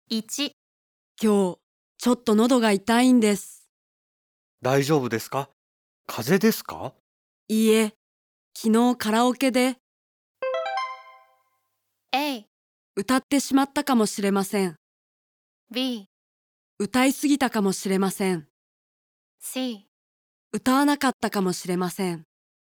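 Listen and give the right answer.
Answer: B: 歌いすぎたかもしれません。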